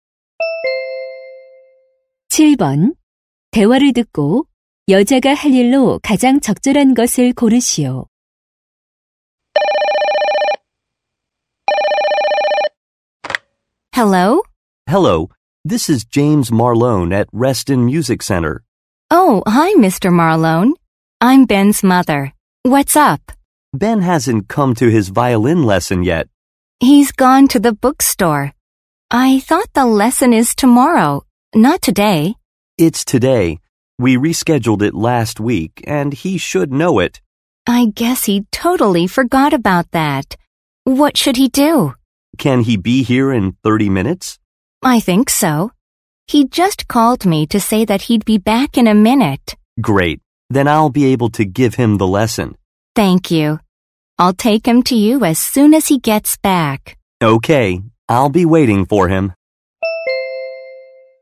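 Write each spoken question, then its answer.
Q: 대화를 듣고 여자가 할 일로 가장 적절한 것을 고르시오.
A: 아들 Ben을 바이올린 레슨에 데려다주기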